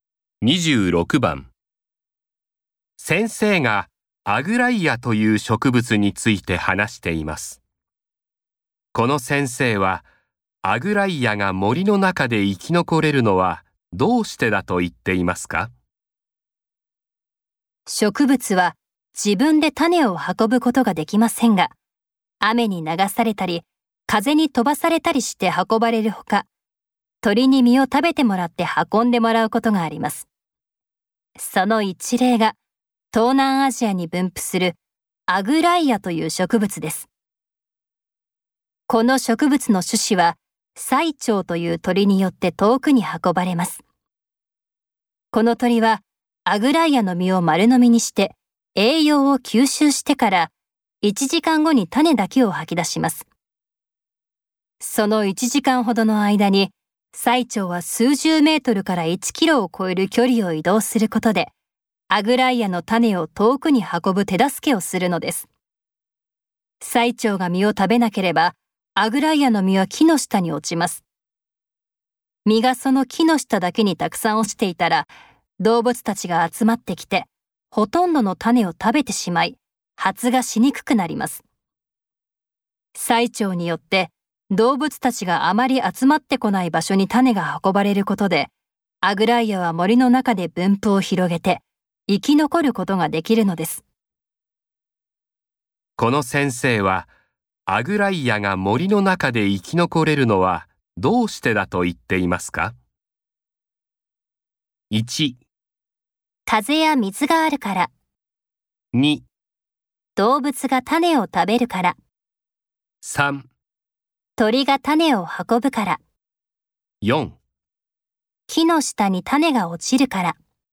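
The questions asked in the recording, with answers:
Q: この先生はアグライアが森の中で生き残れるのはどうしてだと言っていますか?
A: 3: 鳥が種を運ぶから。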